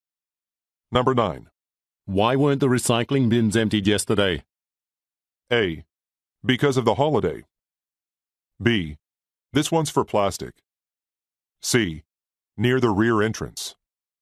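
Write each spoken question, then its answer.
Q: Why weren't the recycling bins emptied yesterday?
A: A: Because of the holiday.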